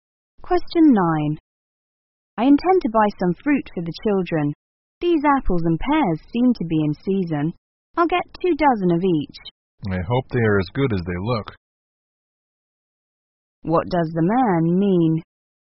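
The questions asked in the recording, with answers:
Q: What does the man mean?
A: He will buy two dozen apples and two dozen pears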